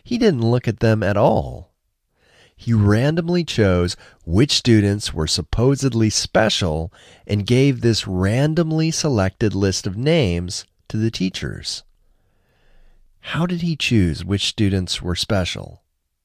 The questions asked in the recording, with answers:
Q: How did he choose which students were special?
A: He randomly chose which students were special.